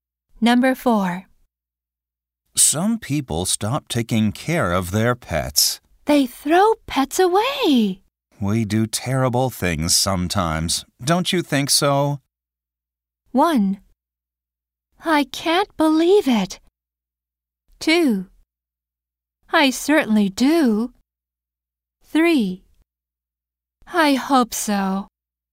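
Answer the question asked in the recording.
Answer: 2: I certainly do.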